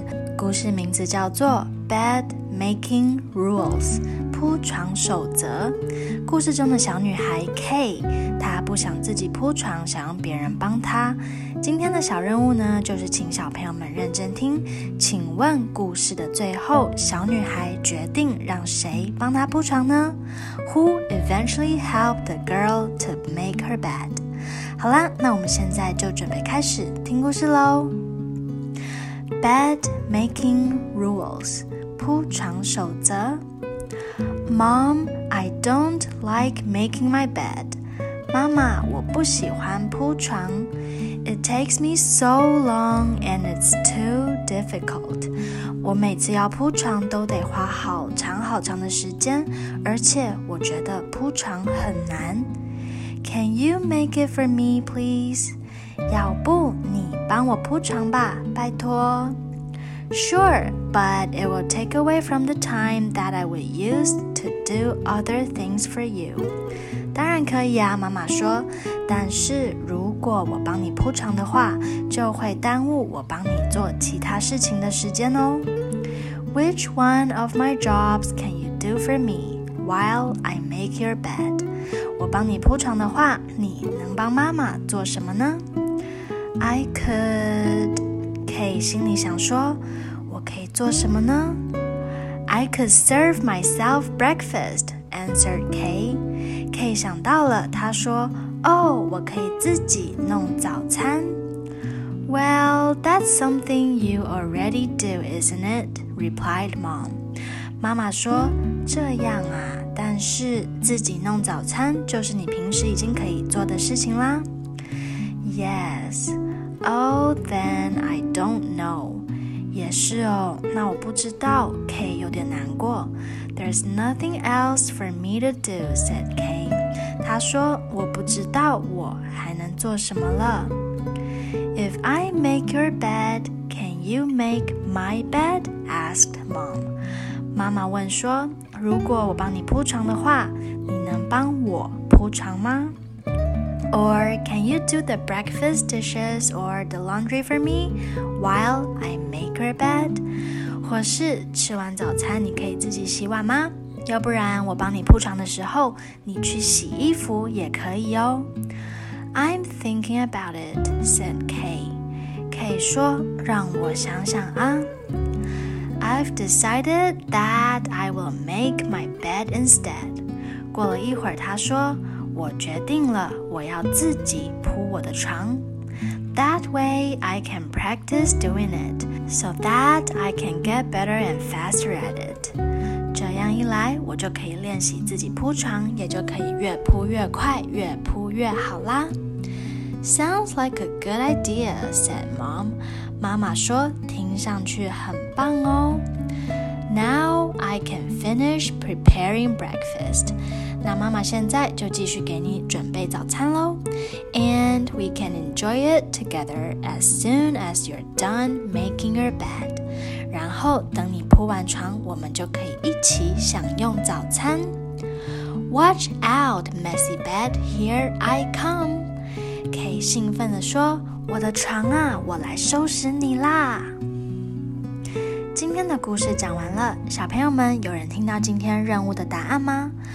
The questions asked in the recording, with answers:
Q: 请问故事的最后,小女孩决定让谁帮她铺床呢?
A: 没错,故事的最后,小女孩没有让任何人帮她,她决定了要自己给自己铺床。